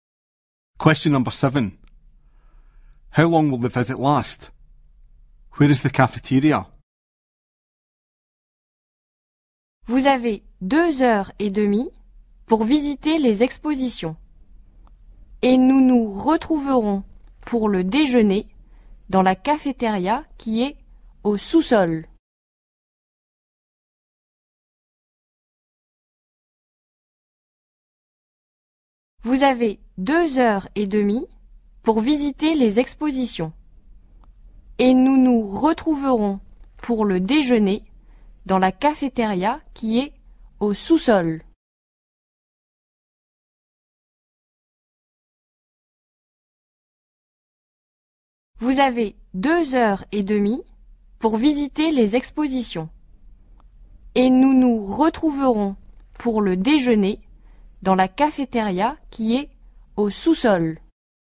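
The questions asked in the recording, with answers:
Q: How long will the visit last?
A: 2 and a half hours

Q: Where is the cafeteria?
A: In the basement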